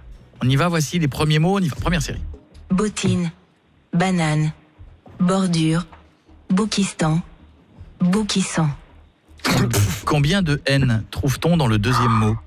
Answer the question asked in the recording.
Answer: Deux.